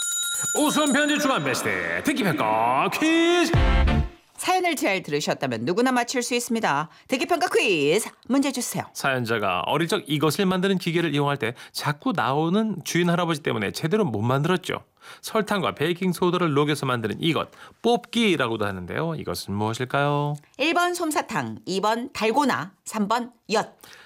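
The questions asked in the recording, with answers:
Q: 이것은 무엇일까요?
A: 2번: 달고나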